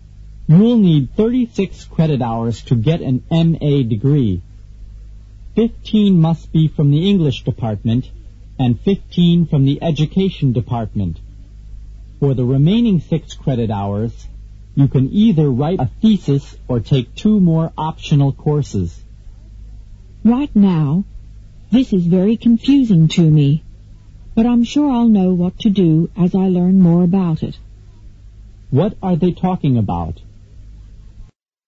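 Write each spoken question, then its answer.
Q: What are they talking about?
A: The requirements for getting an MA degree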